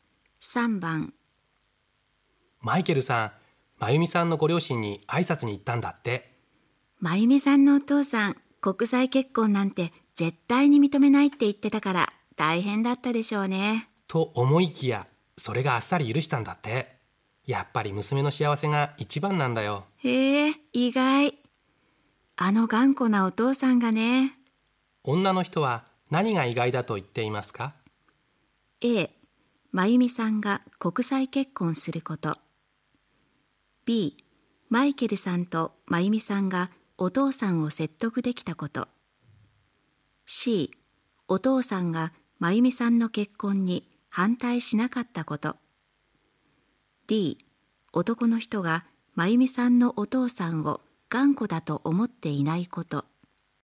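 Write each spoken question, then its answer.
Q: 女の人は何が意外だと言っていますか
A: C: お父さんが真由美さんの結婚に反対しなかったこと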